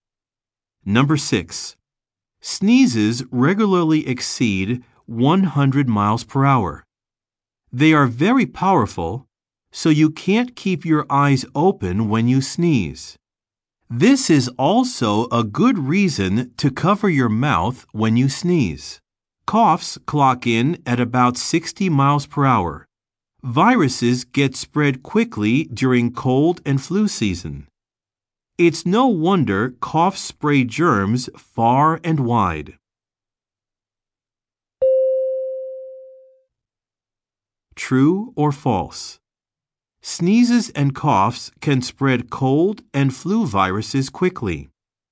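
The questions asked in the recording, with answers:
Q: True or false? Sneezes and coughs can spread cold and flu viruses quickly.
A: True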